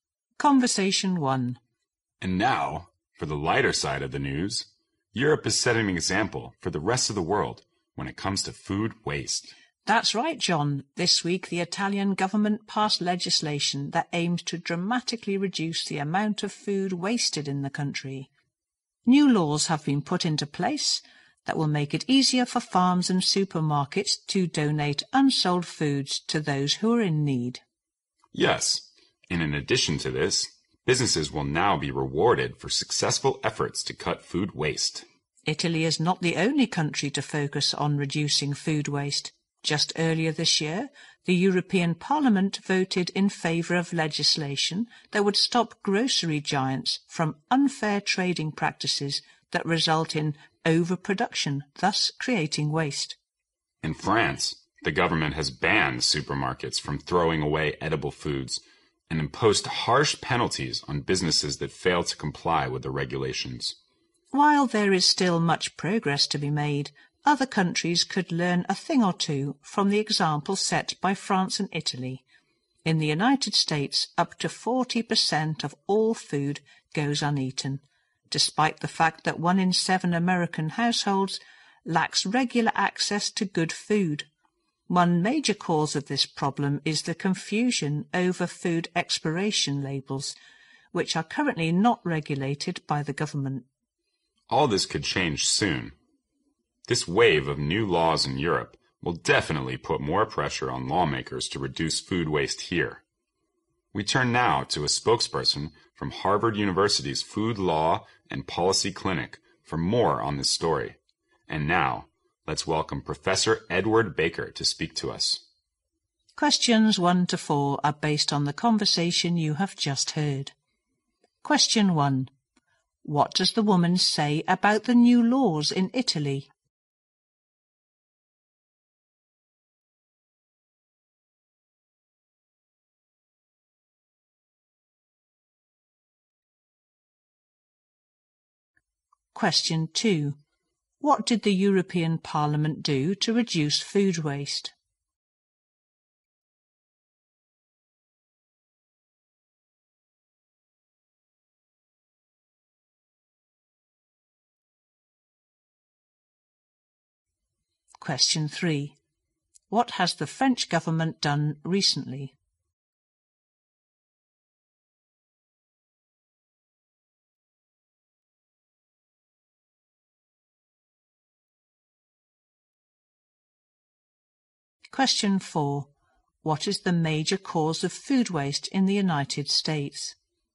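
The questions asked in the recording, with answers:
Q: What does the woman say about the new laws in Italy?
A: They make it easier for farms and supermarkets to donate unsold food to people in need

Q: What did the European Parliament do to reduce food waste?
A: It voted for legislation to stop grocery giants' unfair trading practices that cause overproduction

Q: What has the French government done recently?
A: It banned supermarkets from throwing away edible food

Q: What is the major cause of food waste in the United States?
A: Confusion over food expiration labels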